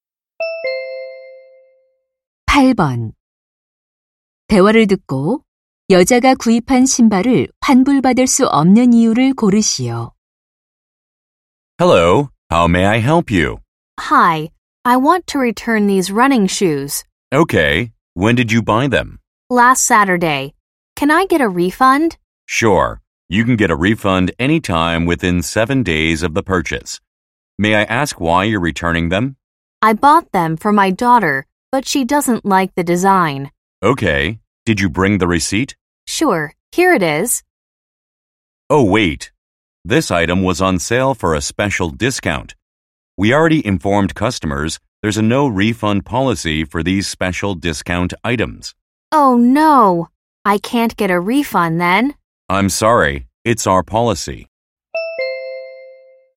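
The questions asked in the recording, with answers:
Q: 대화를 듣고 여자가 구입한 신발을 환불받을 수 없는 이유를 고르시오.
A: 특별 할인 상품이라 환불 불가 정책 때문에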